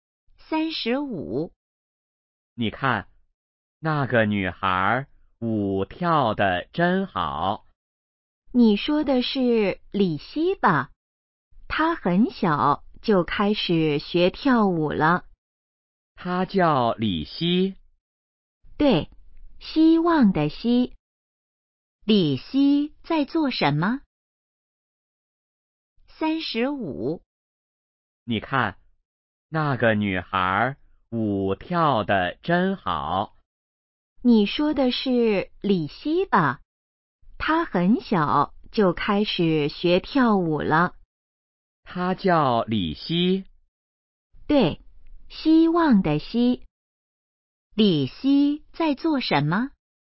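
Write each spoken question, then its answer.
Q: 李希在做什么?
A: 跳舞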